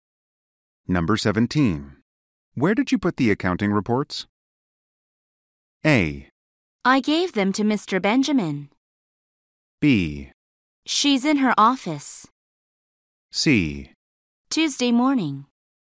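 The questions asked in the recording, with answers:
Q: Where did you put the accounting reports?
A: A: I gave them to Mr. Benjamin.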